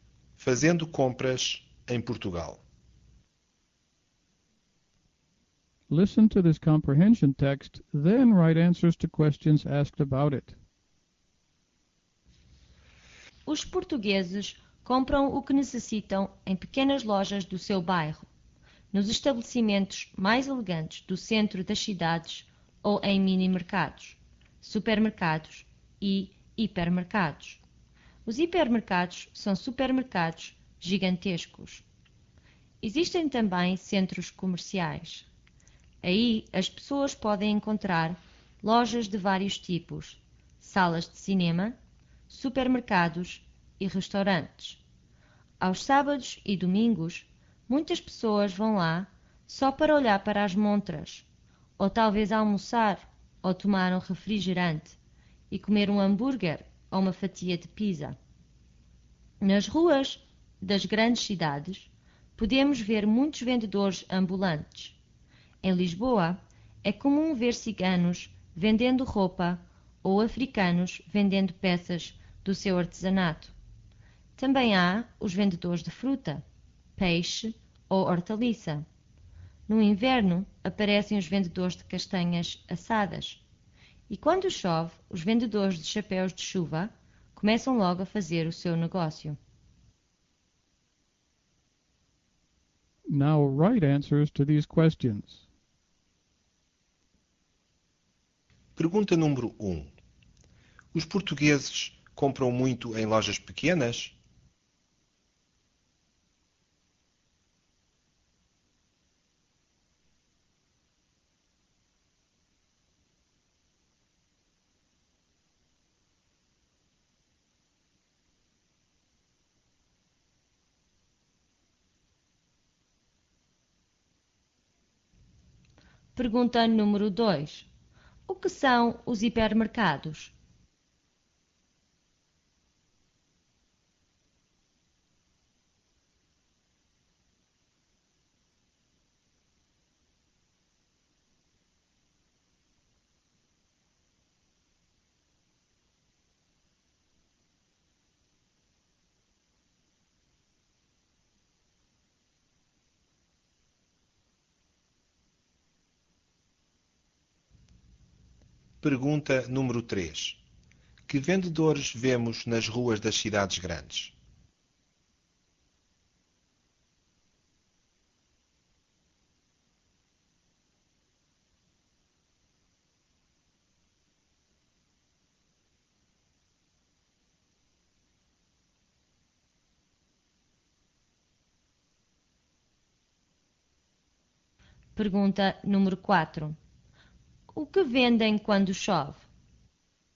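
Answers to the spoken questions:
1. Sim, compram em pequenas lojas do seu bairro.
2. São supermercados gigantescos.
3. Vendedores ambulantes: ciganos vendendo roupa, africanos vendendo artesanato, vendedores de fruta, peixe, hortaliça e castanhas assadas.
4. Chapéus de chuva.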